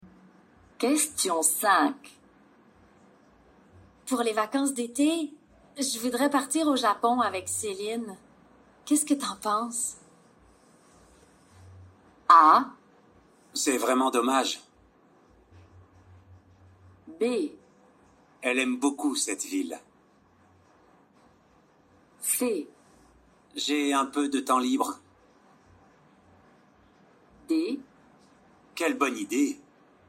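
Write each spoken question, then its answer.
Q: Qu'est-ce que t'en penses?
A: D: Quelle bonne idée!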